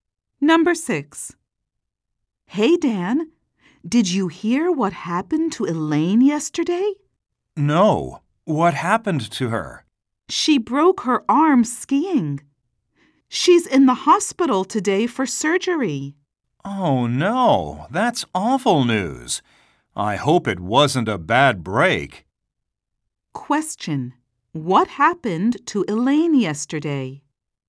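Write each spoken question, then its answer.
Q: What happened to Elaine yesterday?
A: She broke her arm skiing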